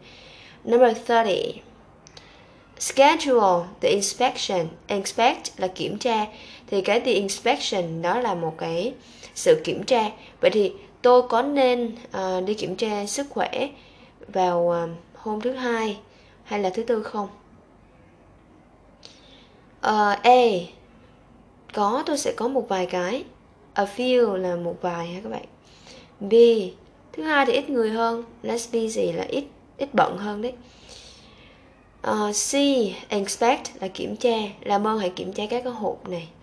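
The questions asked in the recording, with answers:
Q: Vậy thì tôi có nên đi kiểm tra sức khỏe vào hôm thứ hai hay là thứ tư không?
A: B: Thứ hai thì ít người hơn.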